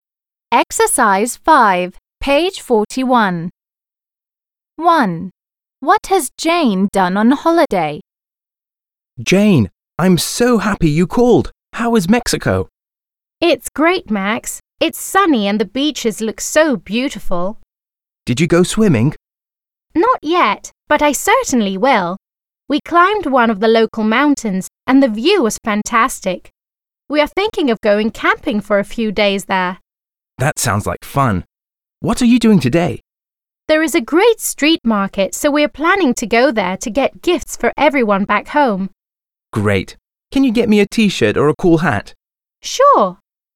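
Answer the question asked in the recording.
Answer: She climbed a local mountain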